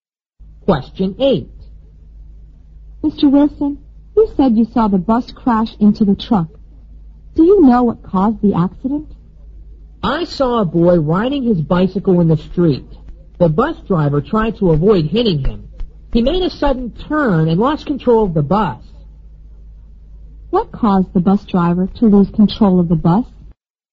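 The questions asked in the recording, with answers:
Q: What caused the bus driver to lose control of the bus?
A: He turned suddenly to avoid hitting a boy on a bicycle.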